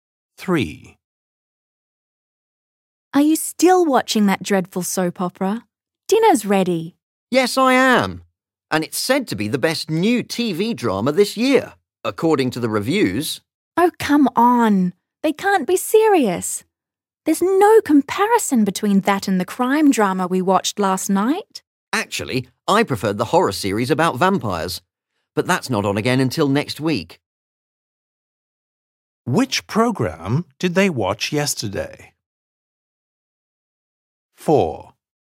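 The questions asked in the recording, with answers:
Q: Which programme did they watch yesterday?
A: the crime drama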